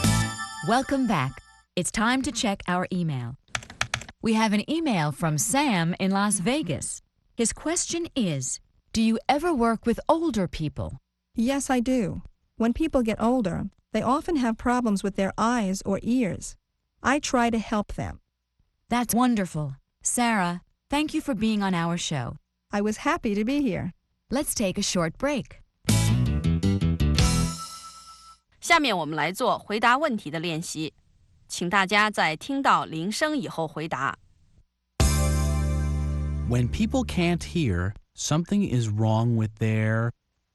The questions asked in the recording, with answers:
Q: When people can't hear, something is wrong with their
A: ears. Something is wrong with their ears.